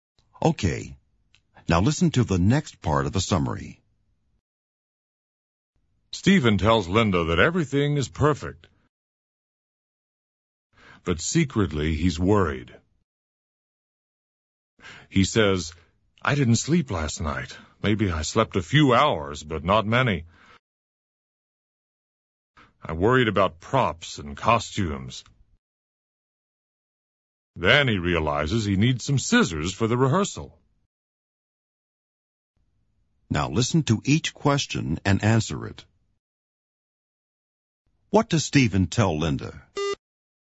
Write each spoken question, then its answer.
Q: What does Stephen tell Linda?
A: That everything is perfect.